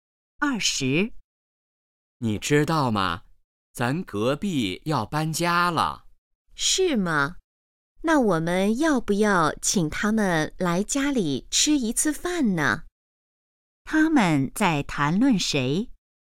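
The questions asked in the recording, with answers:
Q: 他们在谈论谁?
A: 隔壁邻居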